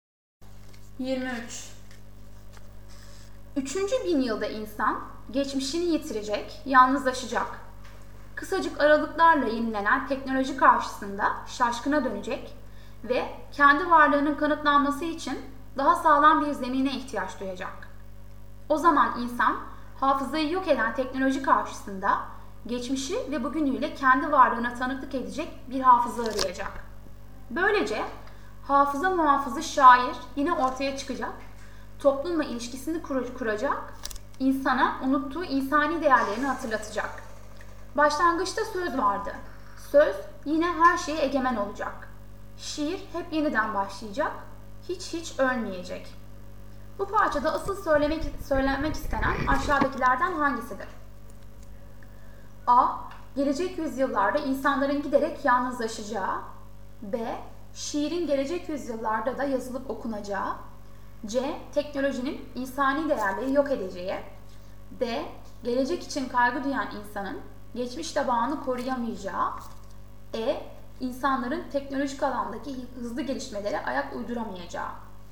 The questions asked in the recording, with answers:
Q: Bu parçada asıl söylenmek istenen aşağıdakilerden hangisidir?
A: Doğru yanıt B.